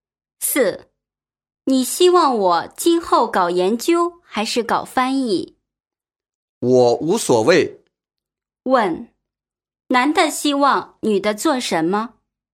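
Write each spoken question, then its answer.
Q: 男的希望女的做什么?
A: 无所谓,搞研究或翻译都可以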